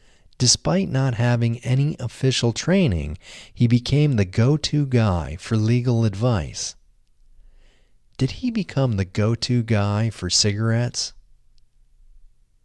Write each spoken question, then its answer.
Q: Did he become the go-to guy for cigarettes?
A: No, he didn't become the go-to guy for cigarettes.